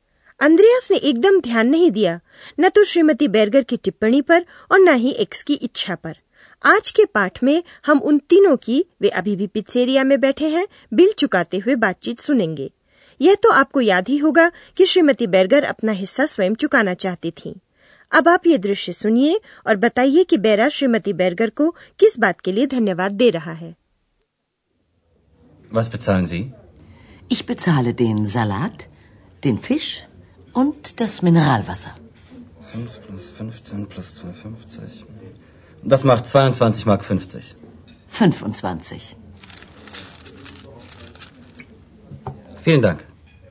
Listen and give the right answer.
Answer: बैरा बख्शीश के लिए धन्यवाद दे रहा है जो श्रीमती बैरगर ने उसे दी है